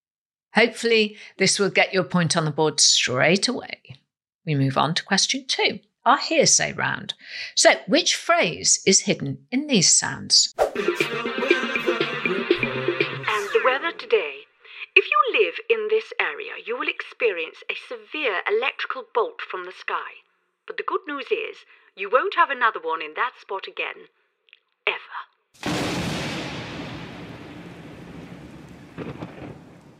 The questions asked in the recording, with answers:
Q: So, which phrase is hidden in these sounds?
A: lightning never strikes the same place twice, or lightning never strikes twice.